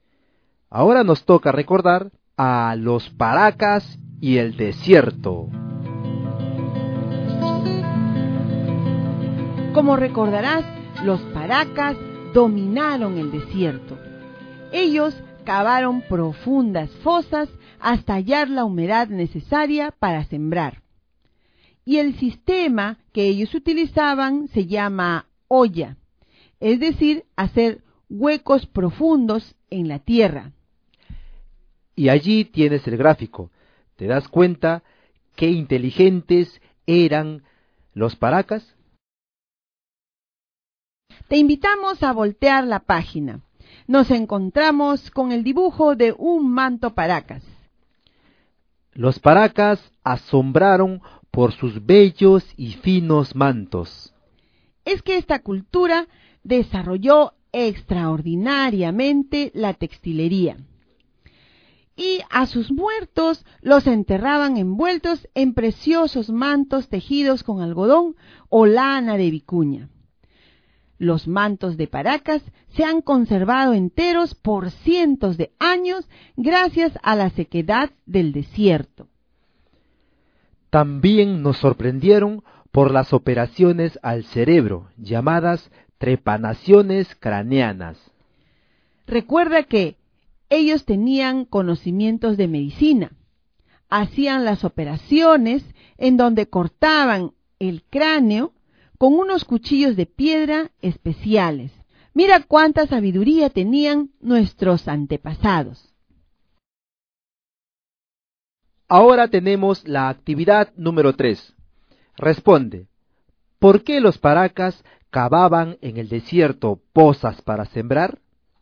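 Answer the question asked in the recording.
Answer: Para hallar la humedad necesaria para sembrar en el desierto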